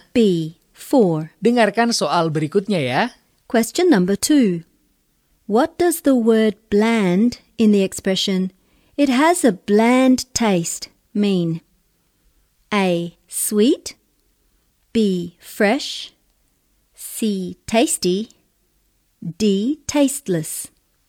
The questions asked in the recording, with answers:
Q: What does the word bland in the expression "it has a bland taste" mean?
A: D. Tasteless.